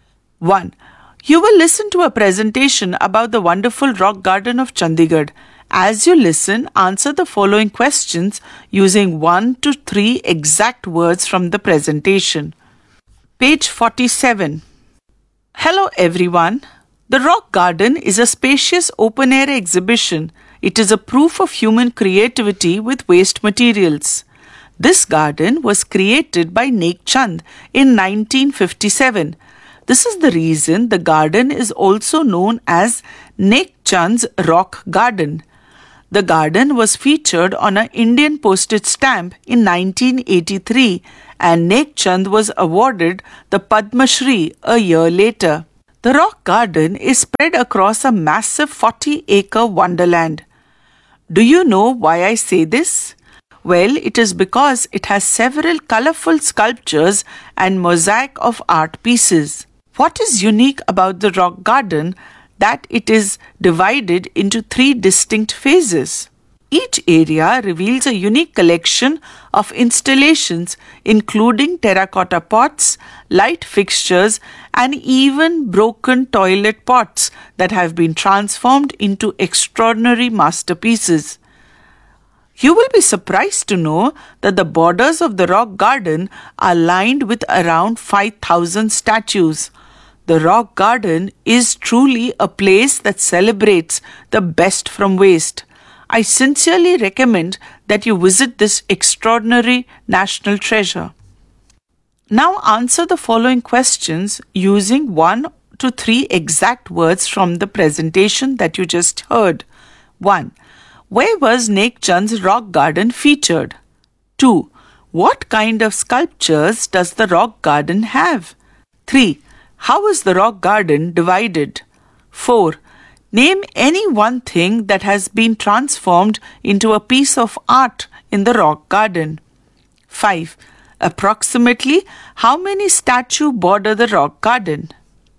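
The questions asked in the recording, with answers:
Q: Where was Nek Chand's rock garden featured?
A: Indian postage stamp

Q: What kind of sculptures does the rock garden have?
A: colorful sculptures

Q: How is the rock garden divided?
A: three distinct phases

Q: Name any one thing that has been transformed into a piece of art in the rock garden.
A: broken toilet pots (or terracotta pots, light fixtures)

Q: Approximately how many statues border the rock garden?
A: around 5,000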